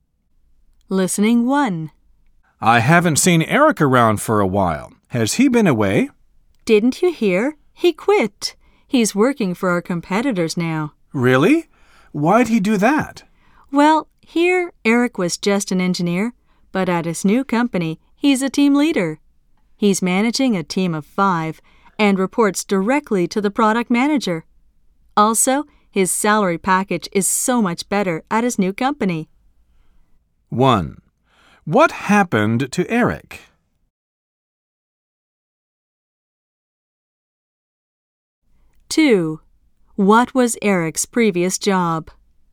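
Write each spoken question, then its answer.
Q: What happened to Eric?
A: He quit and now works for a competitor as a team leader.

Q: What was Eric's previous job?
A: Engineer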